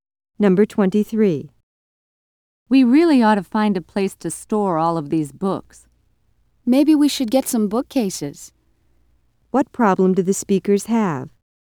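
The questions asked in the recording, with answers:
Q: What problem do the speakers have?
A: They have nowhere to store their books.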